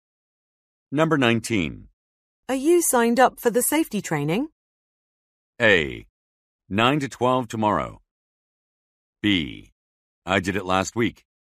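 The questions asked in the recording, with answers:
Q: Are you signed up for the safety training?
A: B: I did it last week.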